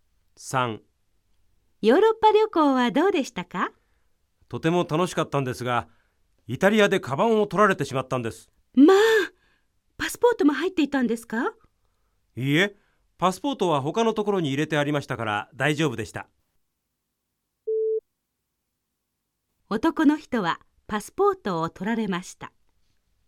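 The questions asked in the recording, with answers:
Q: 男の人はパスポートを取られました。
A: 正しくない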